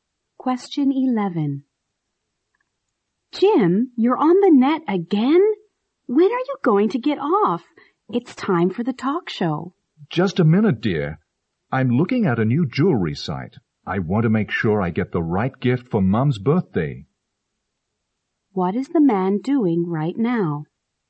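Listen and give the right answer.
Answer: Looking at a jewelry website for his mum's birthday gift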